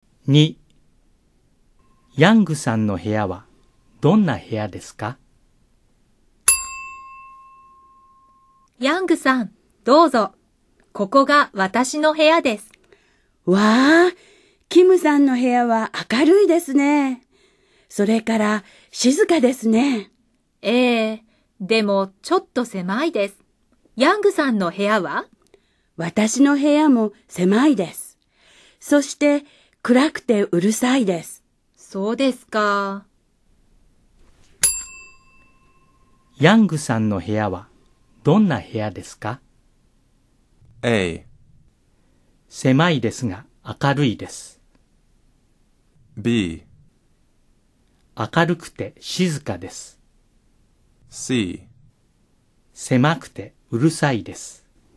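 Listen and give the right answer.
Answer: C: 狭くてうるさいです。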